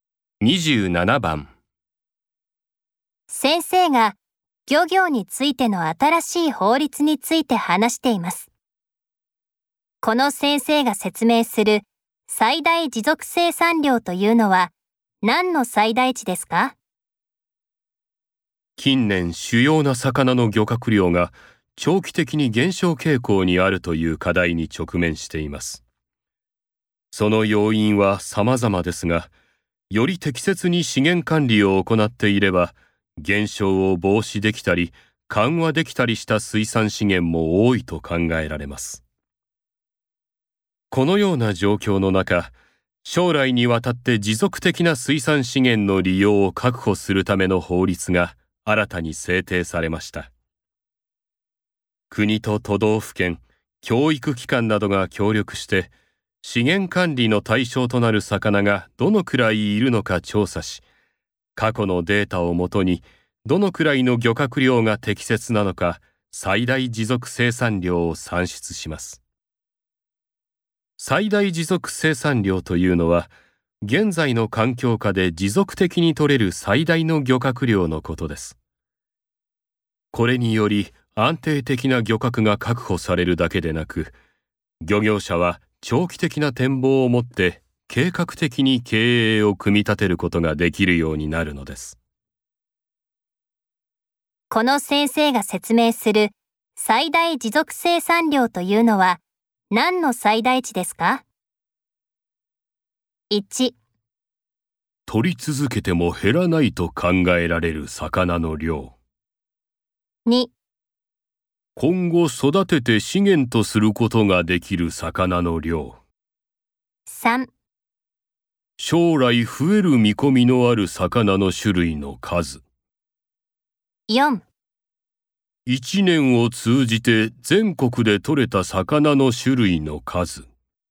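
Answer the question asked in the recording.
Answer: 1: 取り続けても減らないと考えられる魚の量。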